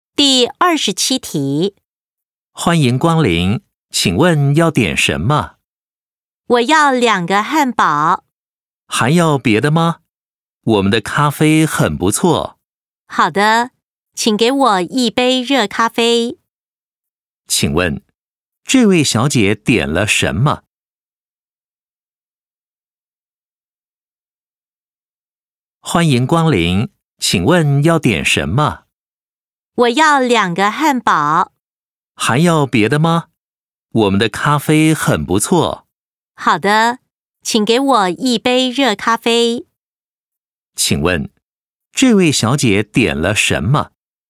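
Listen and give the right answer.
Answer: 两个汉堡和一杯热咖啡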